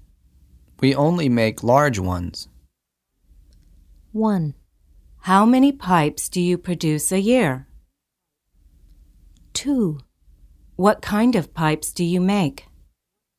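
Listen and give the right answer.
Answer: 2: What kind of pipes do you make?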